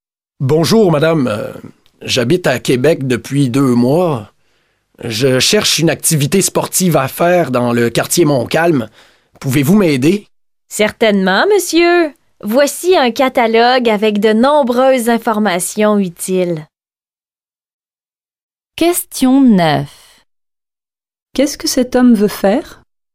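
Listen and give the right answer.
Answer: Une activité sportive dans le quartier Montcalm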